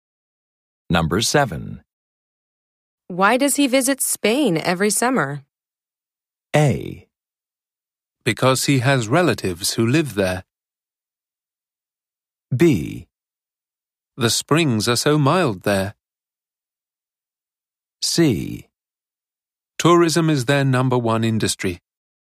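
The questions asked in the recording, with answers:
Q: Why does he visit Spain every summer?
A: A: Because he has relatives who live there.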